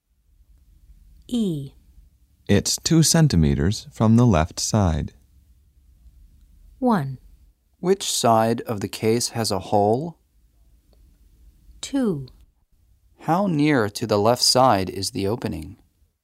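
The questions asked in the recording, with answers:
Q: It's 2 centimeters from the left side.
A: 2: How near to the left side is the opening?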